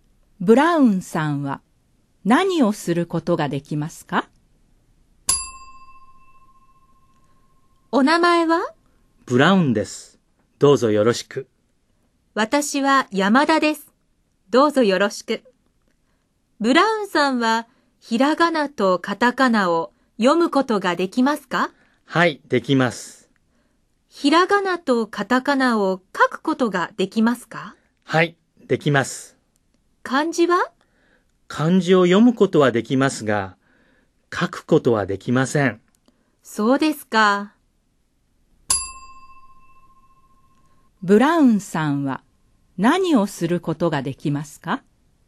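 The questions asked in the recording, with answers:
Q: ブラウンさんは何をすることができますか?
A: ひらがなとカタカナを読むことと書くこと、漢字を読むことができます(漢字を書くことはできません)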